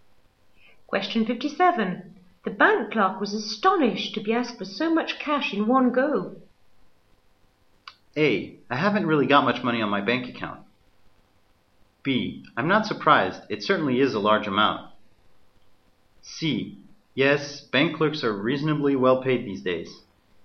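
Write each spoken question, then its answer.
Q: The bank clerk was astonished to be asked for so much cash in one go.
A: B: I'm not surprised. It certainly is a large amount.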